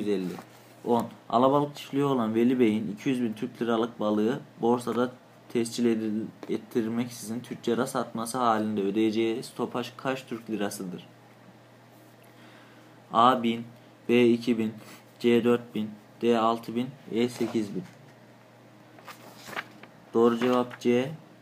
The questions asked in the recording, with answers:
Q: Alabalık çiftliği olan Veli Bey'in 200 bin Türk liralık balığı borsada tescil ettirmeksizin tüccara satması halinde ödeyeceği stopaj kaç Türk lirasıdır?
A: Doğru cevap C. 4000.